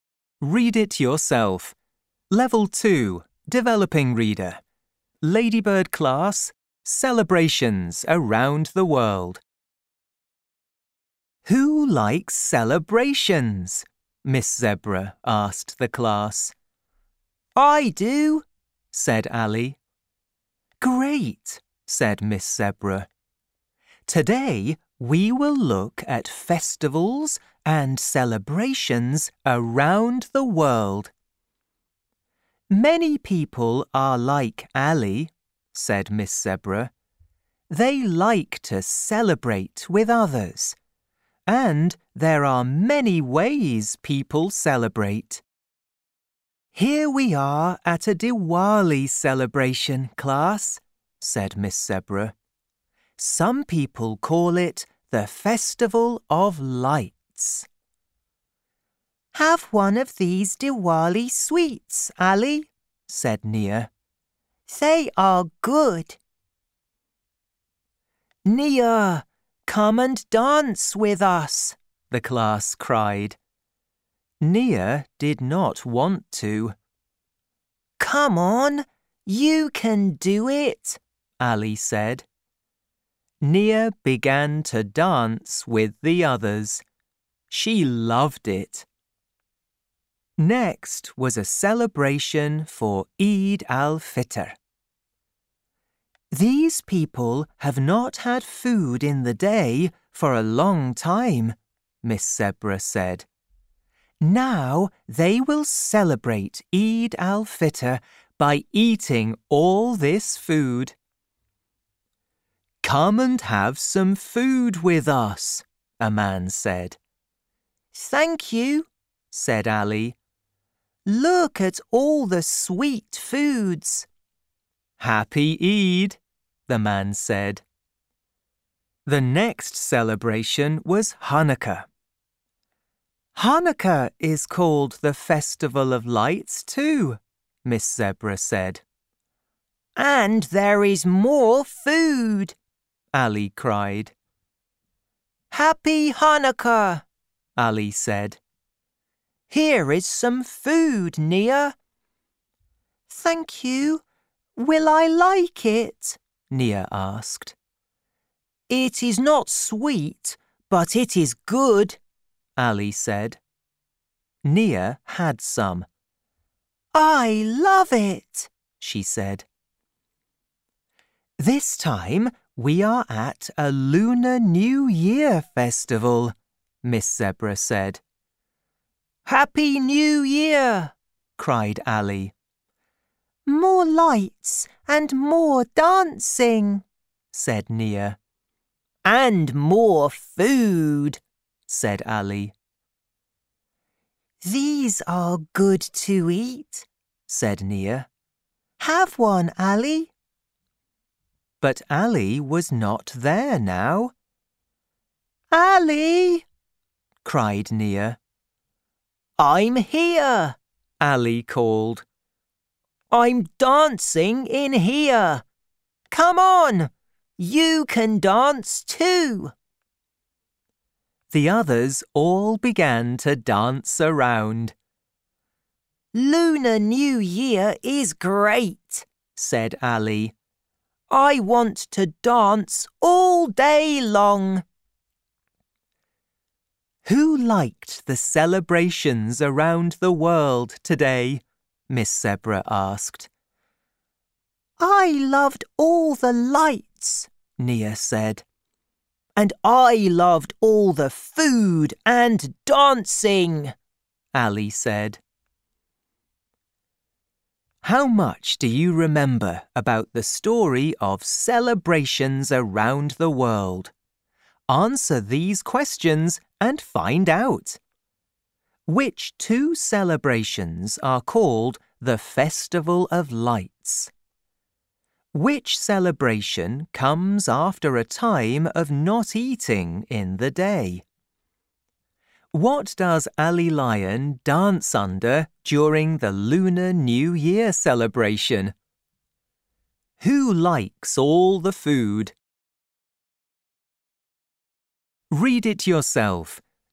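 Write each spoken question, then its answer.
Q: Which two celebrations are called the Festival of Lights?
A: Diwali and Hanukkah

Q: Which celebration comes after a time of not eating in the day?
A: Eid al-Fitr

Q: Who likes all the food?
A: Ali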